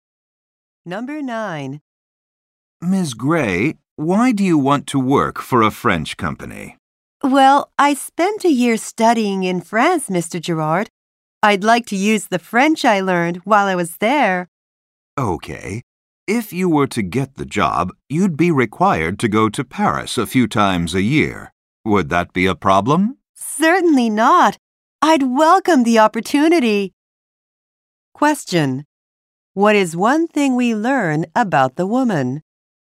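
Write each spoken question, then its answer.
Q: What is one thing we learn about the woman?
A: She studied in France for a year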